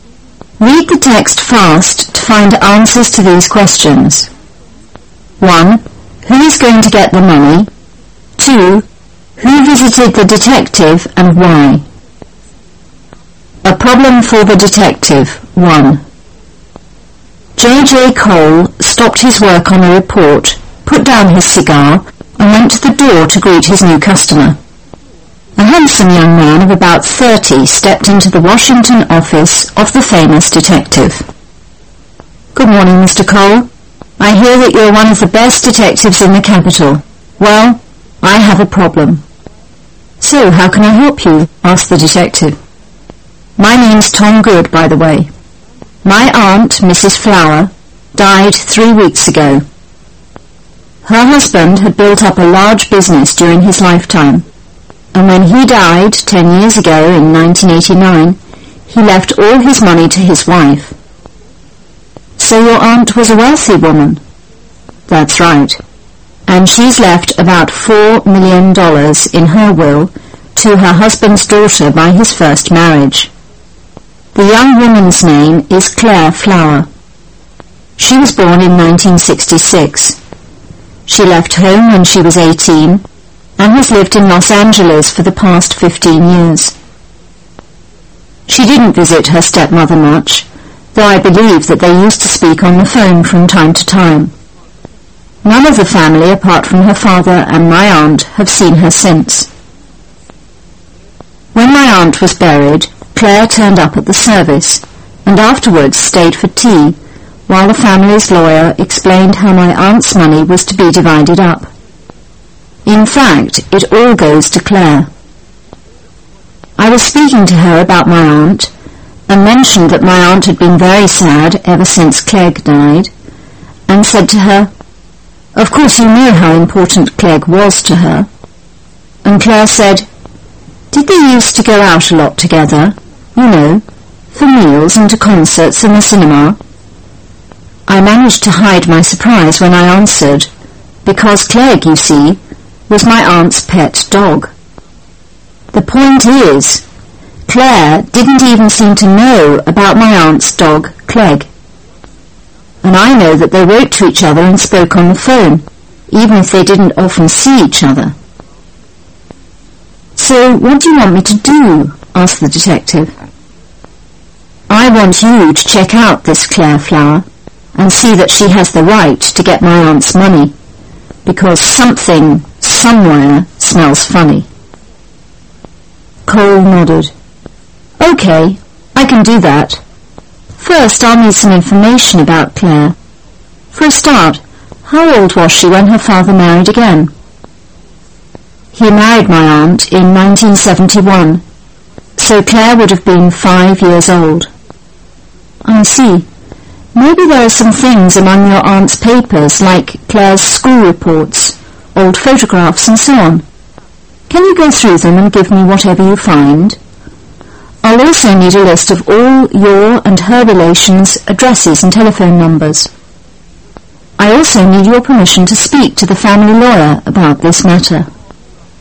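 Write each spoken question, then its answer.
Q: Who is going to get the money?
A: Claire Flower

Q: Who visited the detective and why?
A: Tom Good, to ask him to check whether Claire Flower has the right to his aunt's money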